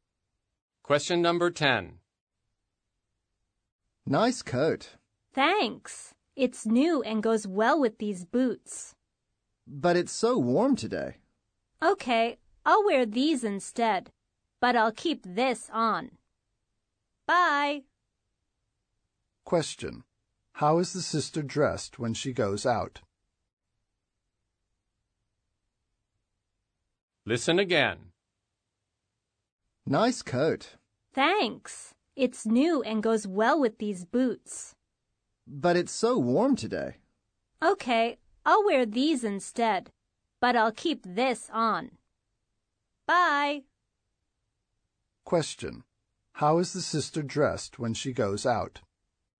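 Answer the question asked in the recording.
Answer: In her new coat, but with different shoes instead of the boots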